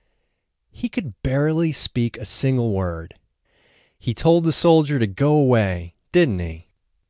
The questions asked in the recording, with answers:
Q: He told the soldier to go away, didn't he?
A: No, he didn't tell the soldier to go away.